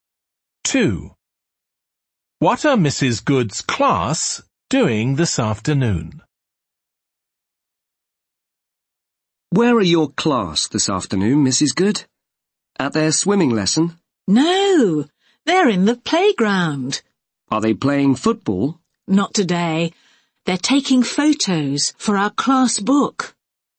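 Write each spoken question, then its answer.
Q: What are Mrs. Good's class doing this afternoon?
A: Taking photos for the class book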